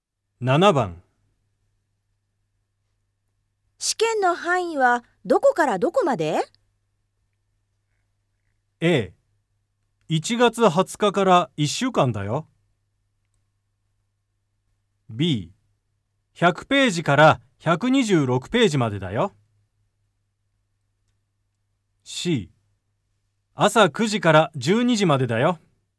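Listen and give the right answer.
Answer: B: 100ページから126ページまでだよ。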